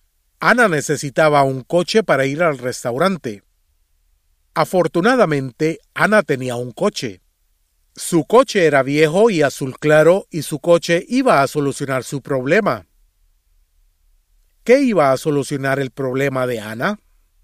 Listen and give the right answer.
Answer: Su coche viejo y azul claro.